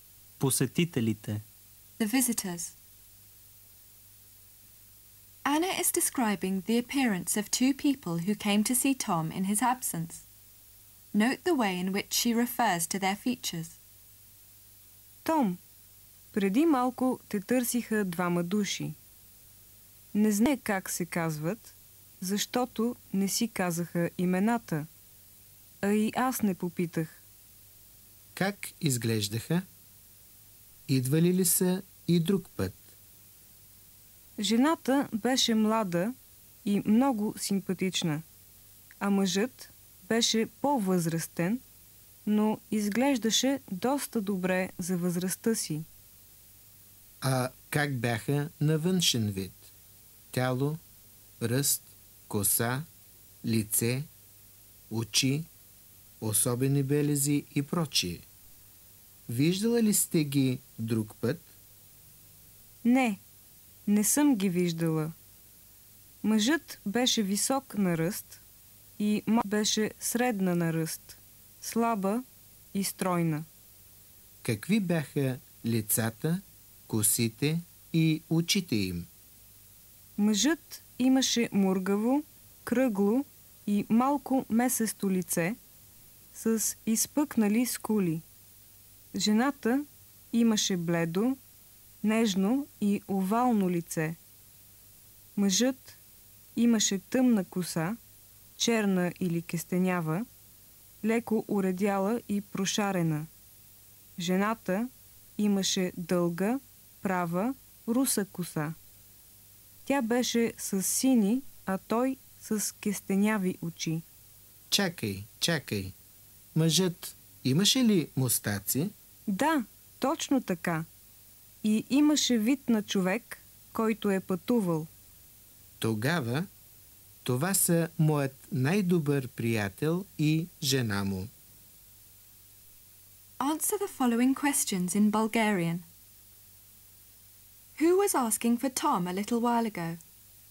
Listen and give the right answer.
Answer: Двама души, мъж и жена.